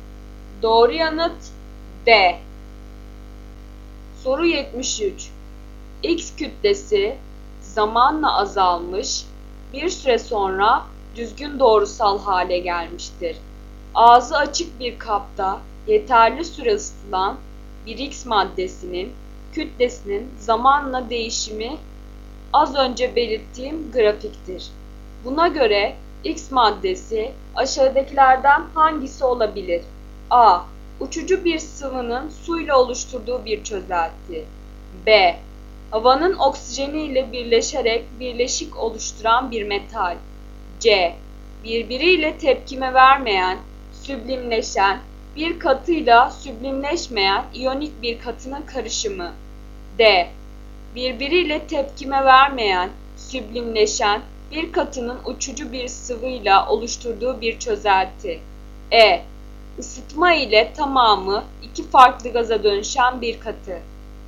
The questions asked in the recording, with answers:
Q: Buna göre X maddesi aşağıdakilerden hangisi olabilir?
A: Doğru yanıt C.